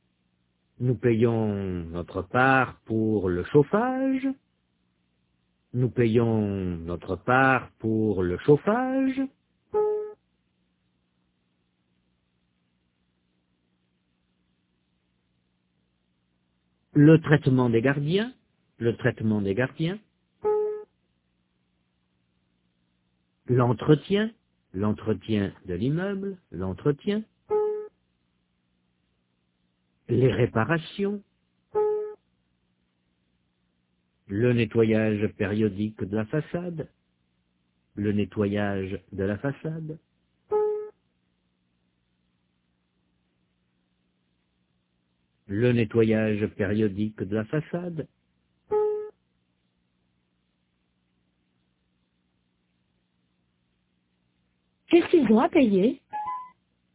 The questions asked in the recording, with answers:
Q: Qu'est-ce qu'ils ont à payer?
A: Le chauffage, le traitement des gardiens, l'entretien, les réparations, le nettoyage périodique de la façade.